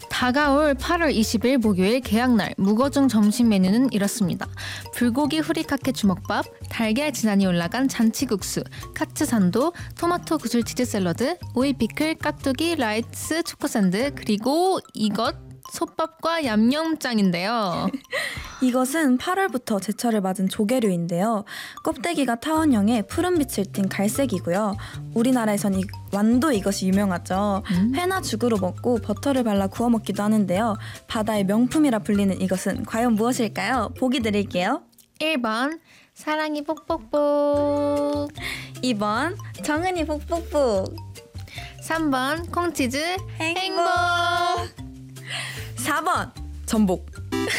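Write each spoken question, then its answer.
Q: 바다의 명품이라 불리는 이것은 과연 무엇일까요?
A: 4: 전복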